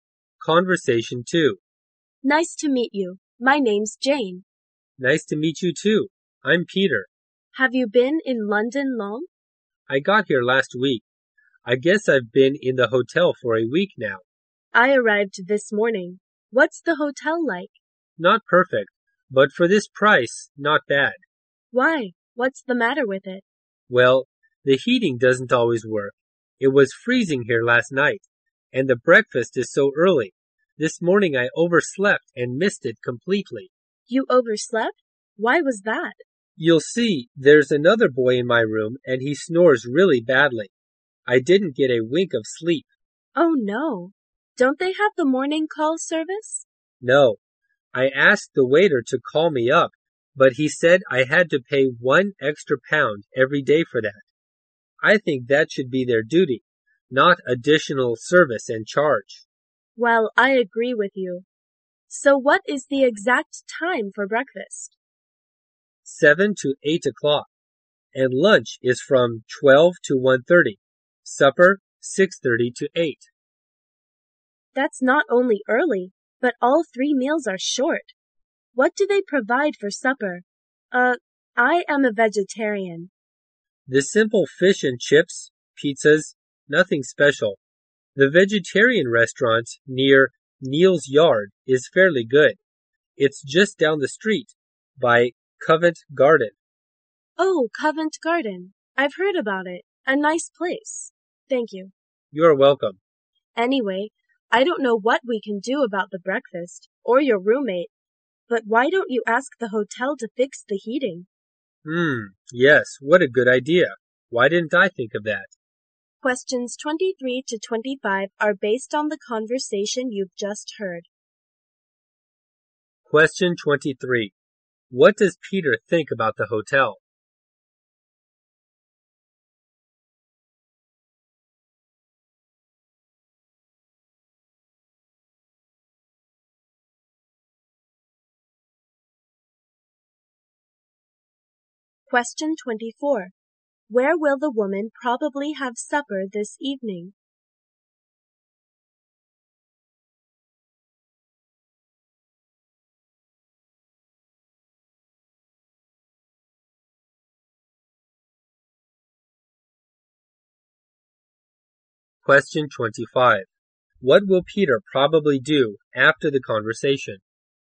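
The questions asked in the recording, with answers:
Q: What does Peter think about the hotel?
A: It's not perfect but not bad for the price.

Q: What will Peter probably do after the conversation?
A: Ask the hotel to fix the heating.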